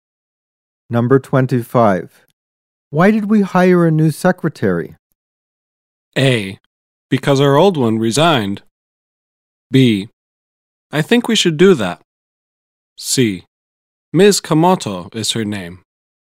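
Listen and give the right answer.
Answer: A: Because our old one resigned.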